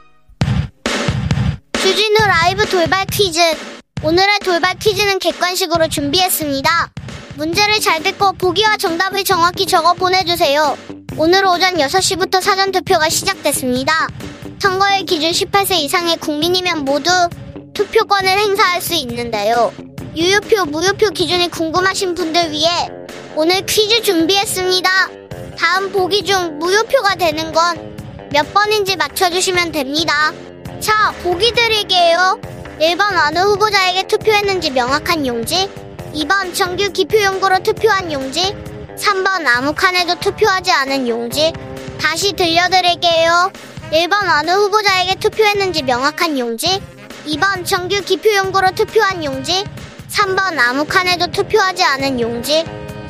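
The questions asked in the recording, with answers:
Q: 다음 보기 중 무효표가 되는 건 몇 번인지 맞춰주시면 됩니다.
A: 3번: 아무 칸에도 투표하지 않은 용지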